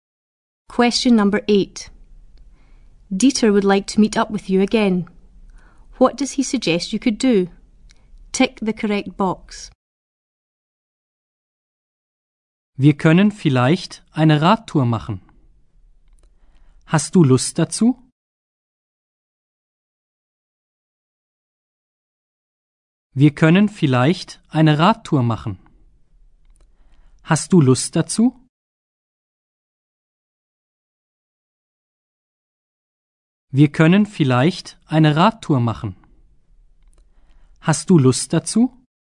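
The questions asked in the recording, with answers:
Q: What does he suggest you could do?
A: Go on a bike ride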